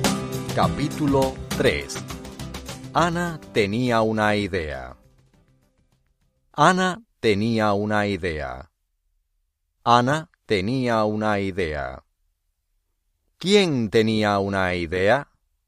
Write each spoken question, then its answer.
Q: ¿Quién tenía una idea?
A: Ana.